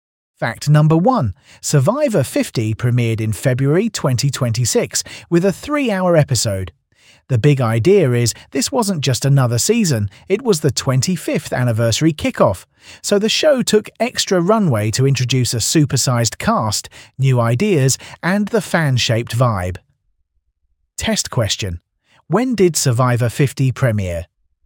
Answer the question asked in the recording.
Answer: February 2026.